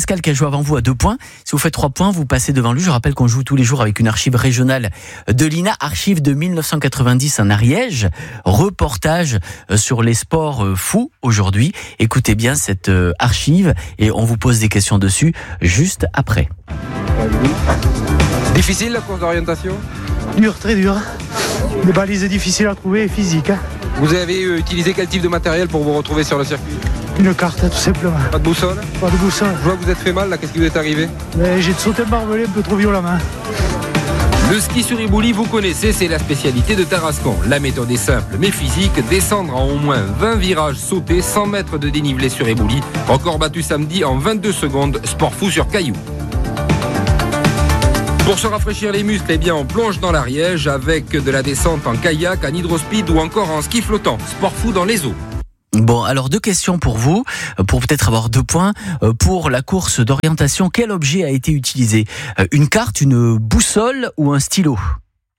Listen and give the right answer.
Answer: Et non, c'est une carte. Il n'y a pas de boussole qui a été utilisée.